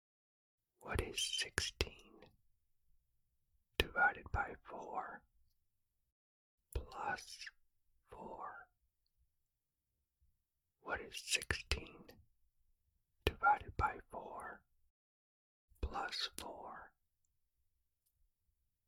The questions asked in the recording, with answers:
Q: What is 16 divided by 4 plus 4?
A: The answer is 8.